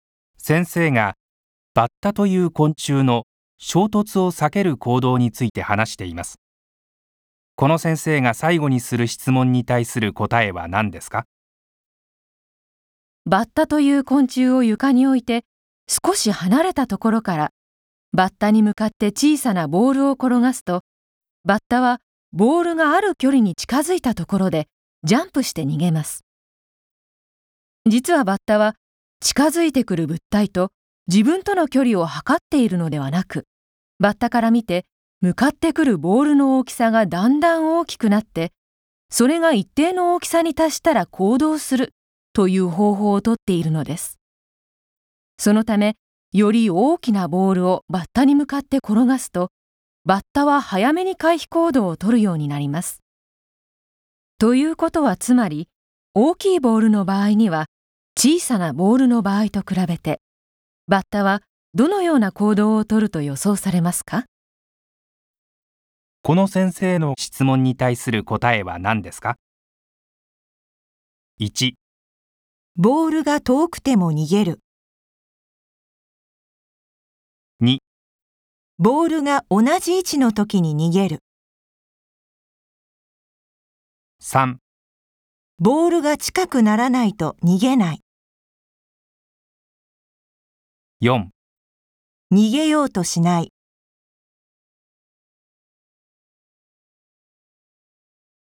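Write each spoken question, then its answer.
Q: この先生の質問に対する答えは何ですか?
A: 1: ボールが遠くても逃げる。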